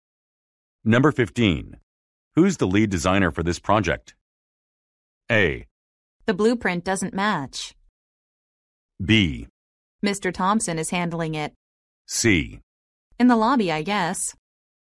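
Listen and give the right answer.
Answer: B: Mr. Thompson is handling it.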